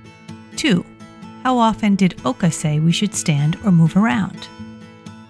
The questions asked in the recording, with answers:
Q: How often did Oka say we should stand or move around?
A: it is recommended that you stand up every 30 minutes or so.